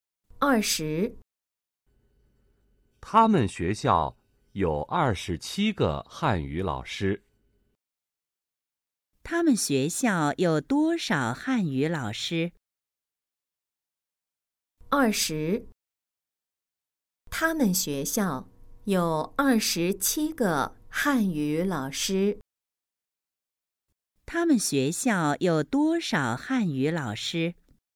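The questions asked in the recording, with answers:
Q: 他们学校有多少汉语老师?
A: 27个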